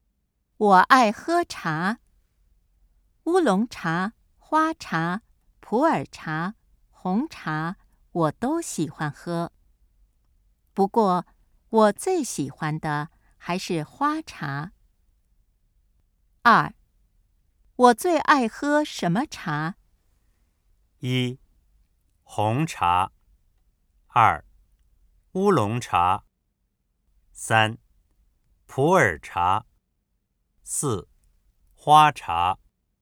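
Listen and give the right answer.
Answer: 四:花茶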